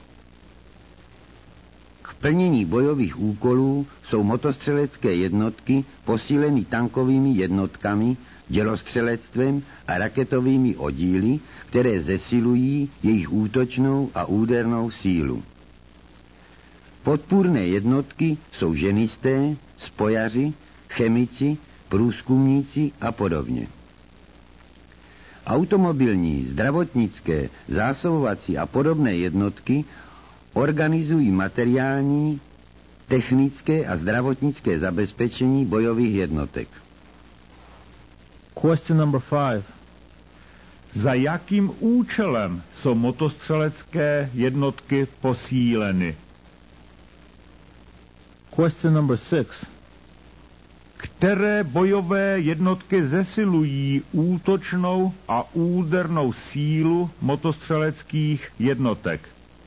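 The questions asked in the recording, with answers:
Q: Za jakým účelem jsou motostřelecké jednotky posíleny?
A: k plnění bojových úkolů

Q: Které bojové jednotky zesilují útočnou a údernou sílu motostřeleckých jednotek?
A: tankové jednotky, dělostřelectvo a raketové oddíly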